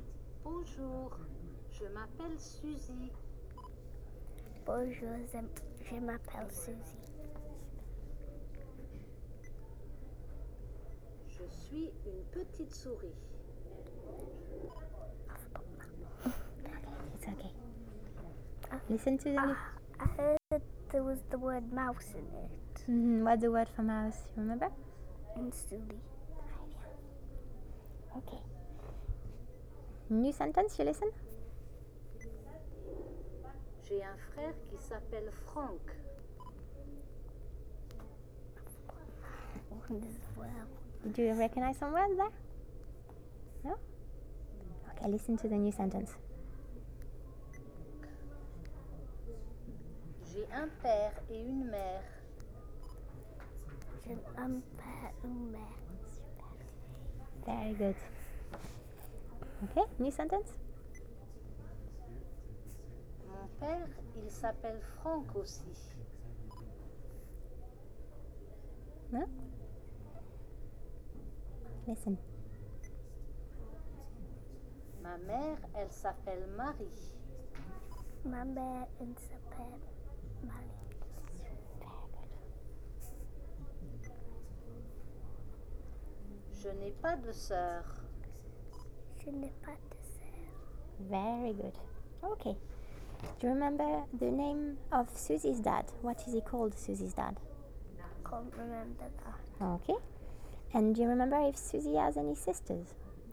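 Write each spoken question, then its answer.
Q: Do you remember the name of Susie's dad?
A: Franck

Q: And do you remember if Suzy has any sisters?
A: No, she has no sisters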